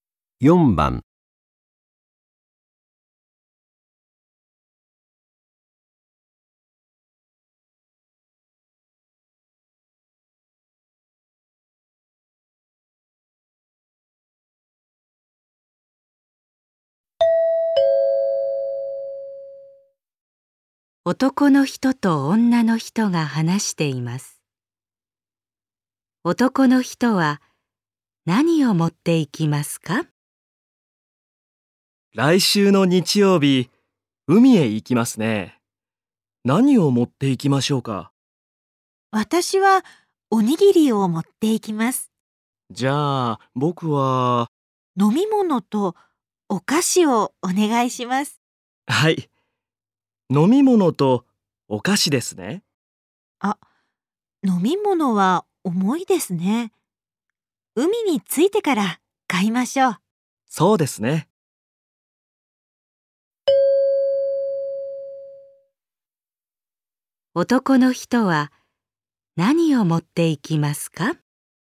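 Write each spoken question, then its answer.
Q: 男の人は何を持っていきますか?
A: お菓子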